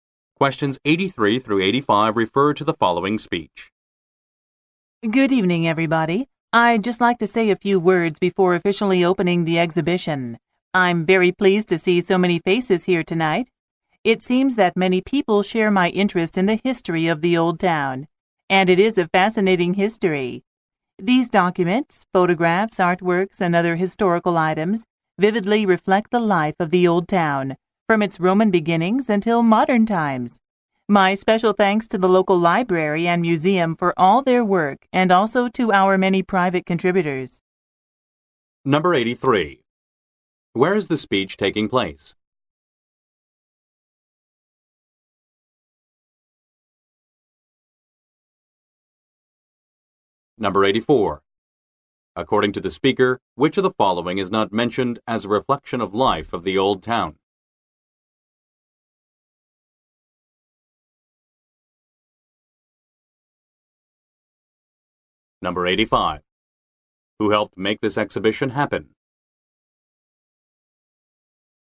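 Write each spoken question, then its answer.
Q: Where is the speech taking place?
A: At the opening of an exhibition

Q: Who helped make this exhibition happen?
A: The local library and museum, and private contributors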